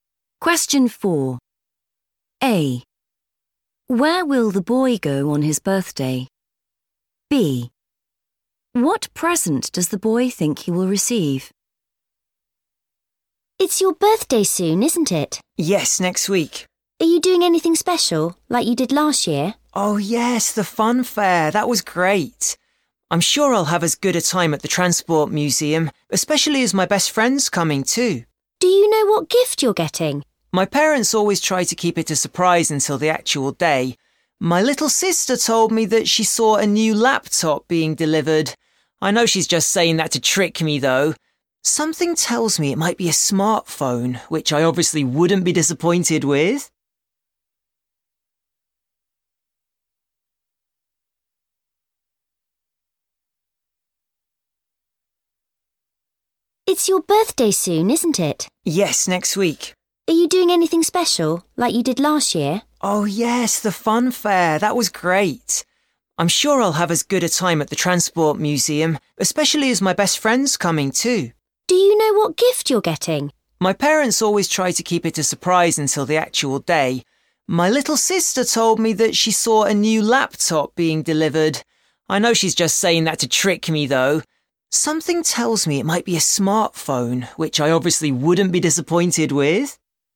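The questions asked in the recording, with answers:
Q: Where will the boy go on his birthday?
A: the Transport Museum

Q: What present does the boy think he will receive?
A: a smartphone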